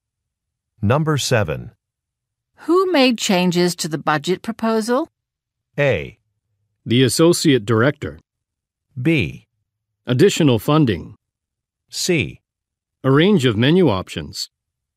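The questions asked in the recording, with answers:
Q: Who made changes to the budget proposal?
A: A: The associate director.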